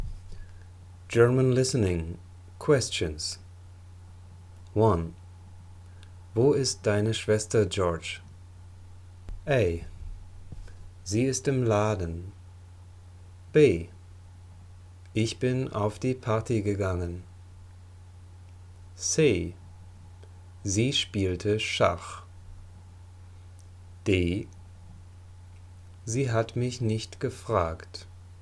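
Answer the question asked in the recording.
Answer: A: Sie ist im Laden.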